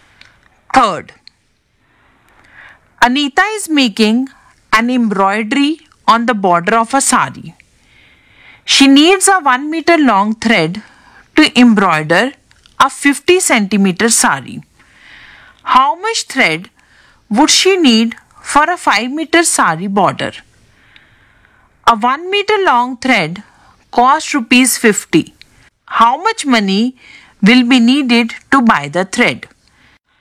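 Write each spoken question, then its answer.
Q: How much thread would she need for a 5 meter sari border?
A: 10 meters

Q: How much money will be needed to buy the thread?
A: Rupees 500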